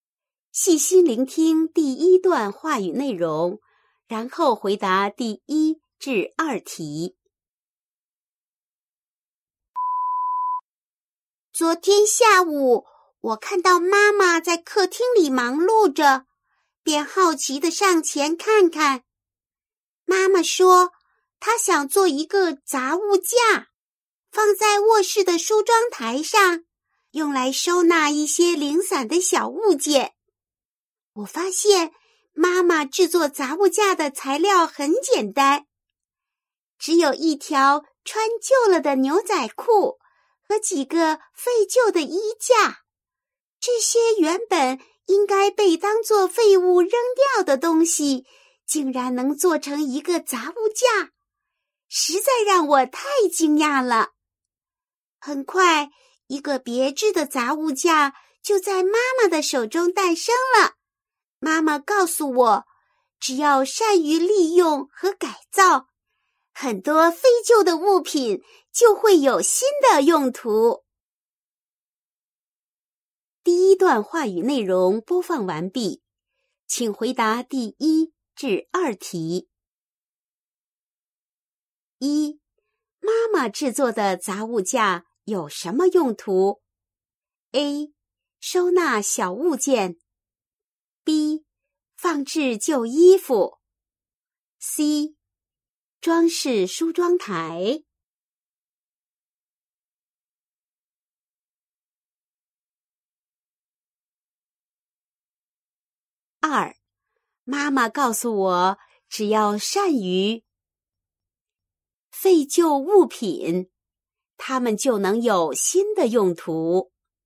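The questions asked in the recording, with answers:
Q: 妈妈制作的杂物架有什么用途? A. 收纳小物件, B. 放置旧衣服, C. 装饰梳妆台。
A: A: 收纳小物件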